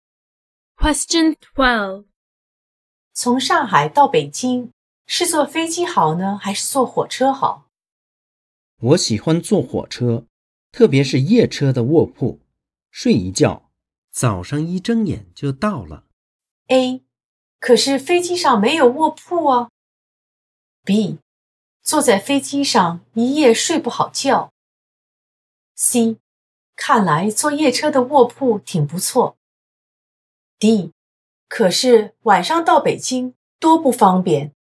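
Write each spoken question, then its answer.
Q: 从上海到北京,是坐飞机好呢,还是坐火车好?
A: C: 看来坐夜车的卧铺挺不错。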